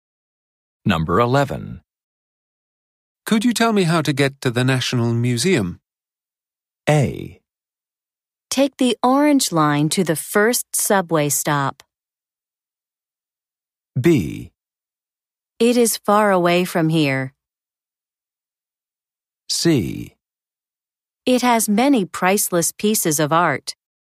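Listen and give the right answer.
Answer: A: Take the orange line to the first subway stop.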